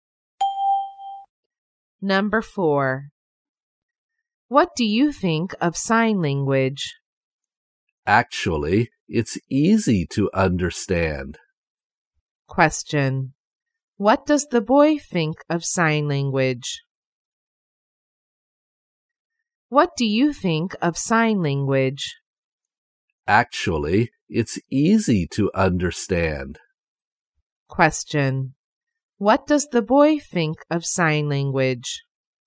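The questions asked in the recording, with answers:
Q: What does the boy think of sign language?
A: It's easy to understand.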